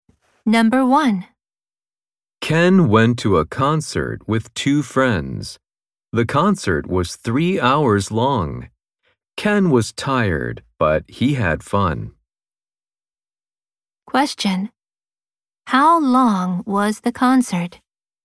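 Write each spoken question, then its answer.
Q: How long was the concert?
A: Three hours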